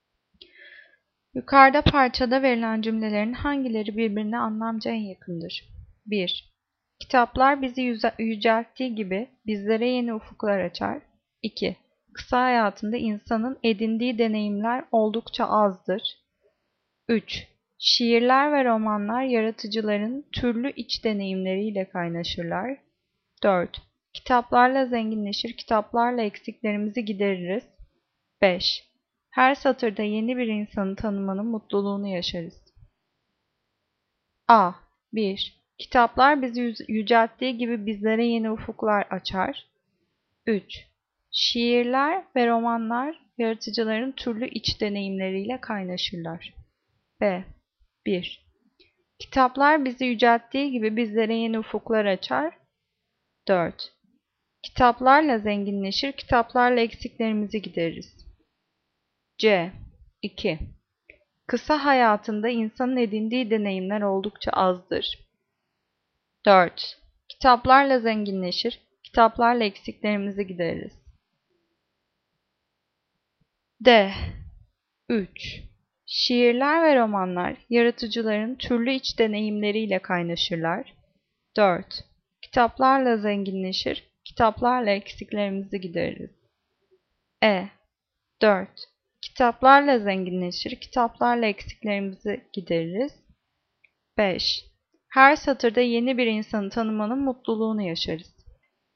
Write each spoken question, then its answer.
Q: Yukarıda parçada verilen cümlelerin hangileri birbirine anlamca en yakındır?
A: Cevap B. 1. Kitaplar bizi yücelttiği gibi bizlere yeni ufuklar açar.